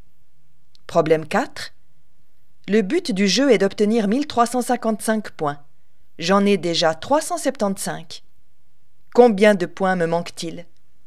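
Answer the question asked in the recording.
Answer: 980 points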